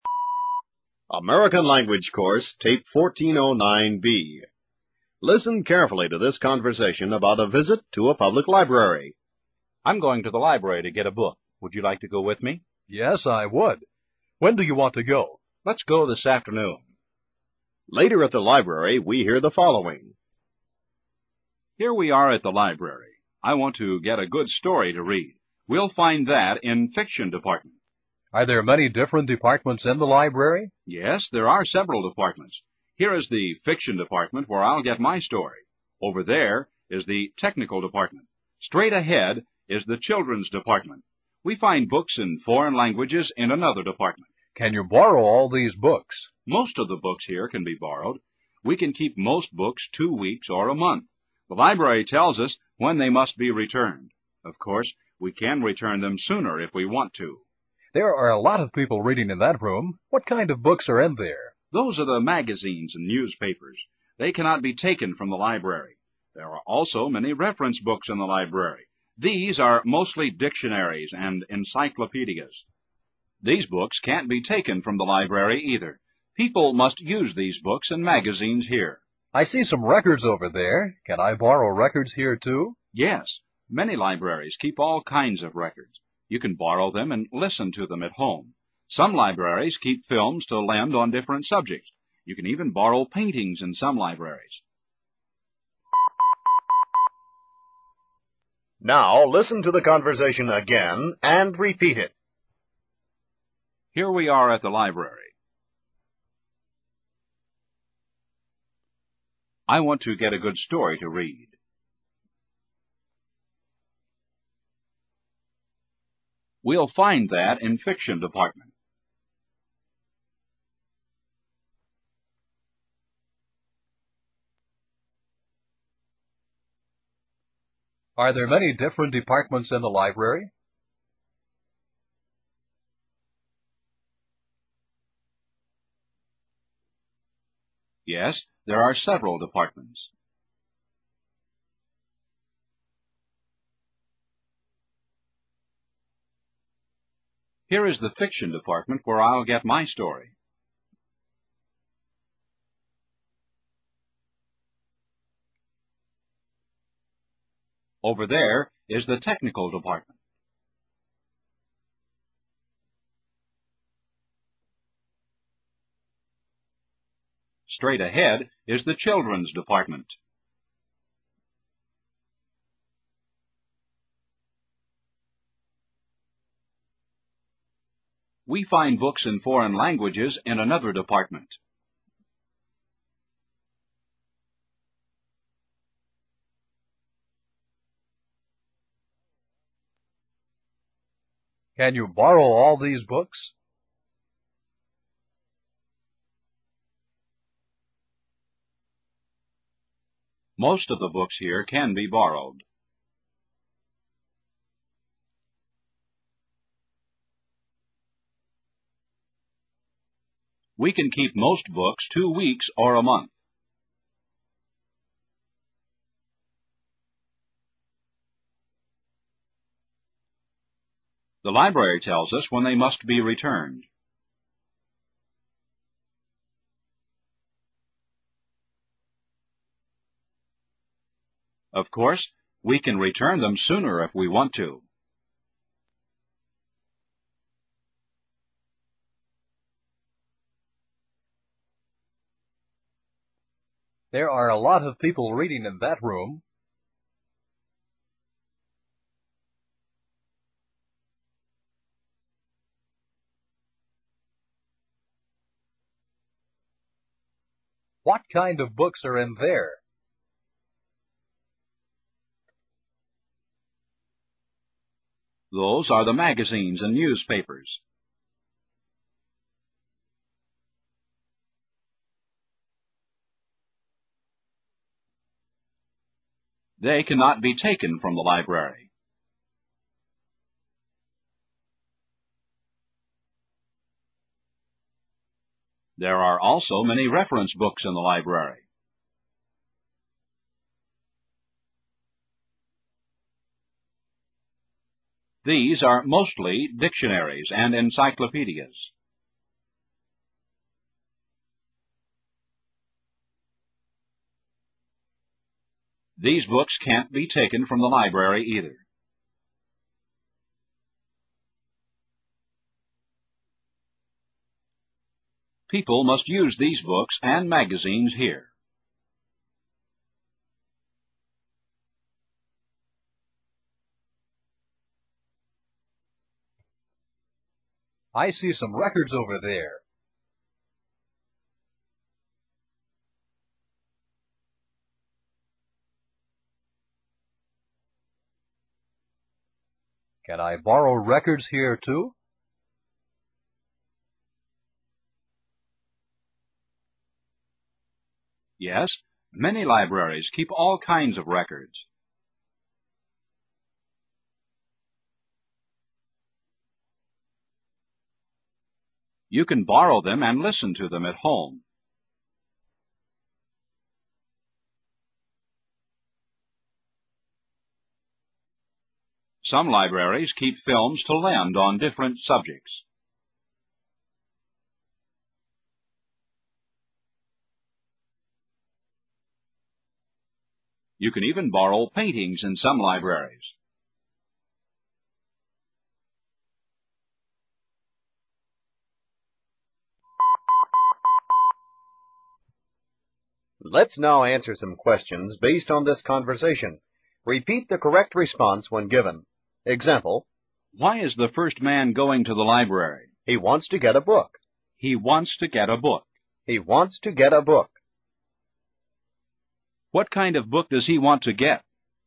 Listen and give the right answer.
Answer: He wants to get a good story.